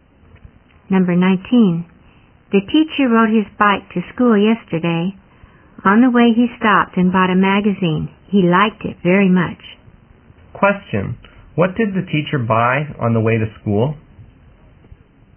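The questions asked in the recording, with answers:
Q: What did the teacher buy on the way to school?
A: A magazine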